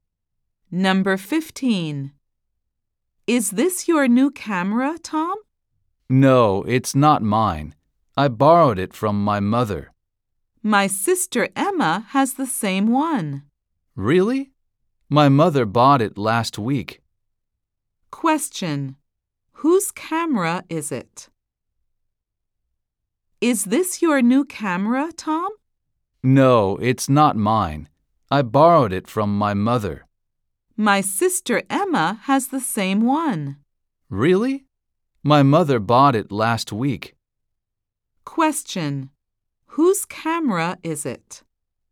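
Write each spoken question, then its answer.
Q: Whose camera is it?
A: Tom's mother's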